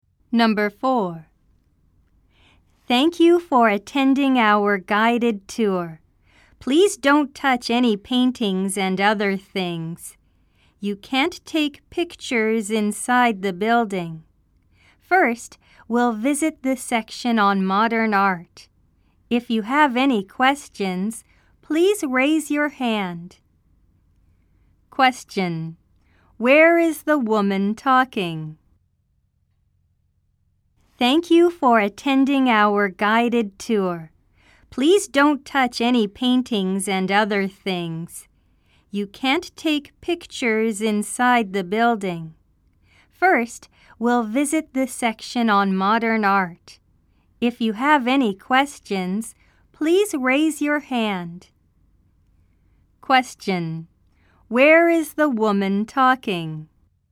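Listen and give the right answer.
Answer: At an art museum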